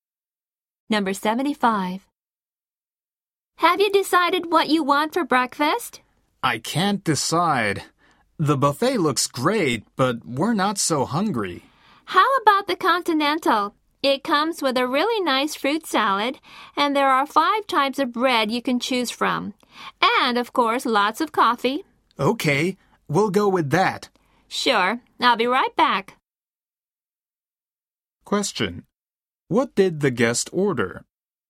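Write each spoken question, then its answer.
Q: What did the guest order?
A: The Continental breakfast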